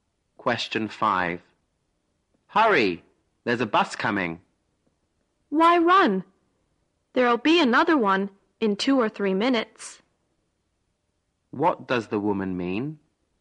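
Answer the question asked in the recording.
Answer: There's no need to run, because another bus will come in 2 or 3 minutes.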